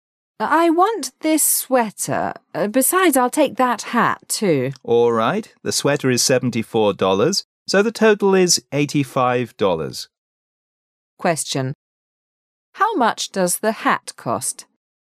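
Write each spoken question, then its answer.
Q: How much does the hat cost?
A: $11

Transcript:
[解析] Woman: I want this sweater. Besides, I'll take that hat, too. Man: All right. The sweater is $74, so the total is $85. Question: How much does the hat cost?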